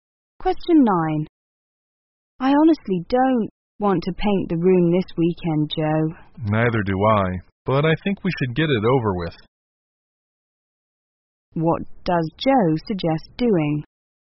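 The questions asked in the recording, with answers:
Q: What does Joe suggest doing?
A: Painting the room this weekend anyway.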